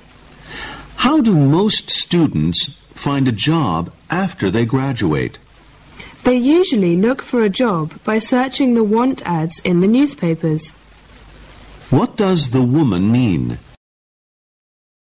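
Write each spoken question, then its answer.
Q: What does the woman mean?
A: Most graduates find jobs by searching the want ads in newspapers.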